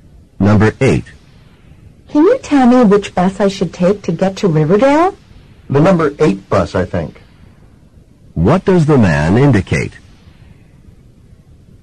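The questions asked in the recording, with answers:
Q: What does the man indicate?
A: He thinks the number 8 bus goes to Riverdale, but he isn't sure.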